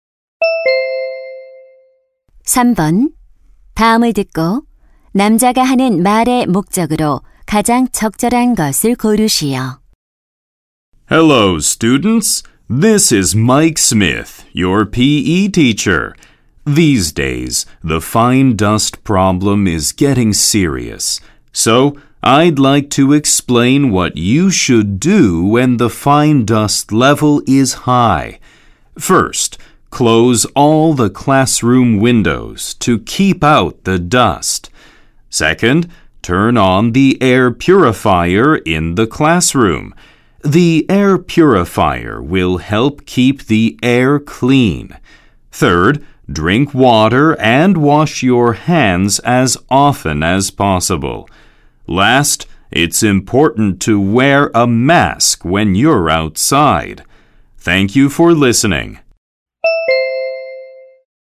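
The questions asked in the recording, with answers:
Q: 다음을 듣고 남자가 하는 말의 목적으로 가장 적절한 것을 고르시오.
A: 미세먼지 농도가 높을 때의 행동 요령을 안내하려고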